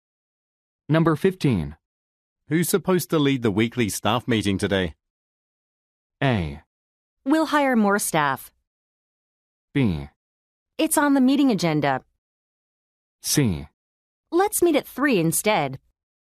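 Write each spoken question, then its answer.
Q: Who's supposed to lead the weekly staff meeting today?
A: B: It's on the meeting agenda.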